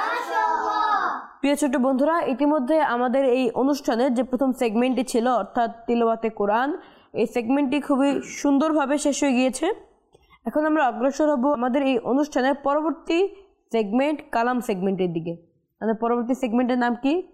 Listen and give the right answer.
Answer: কালাম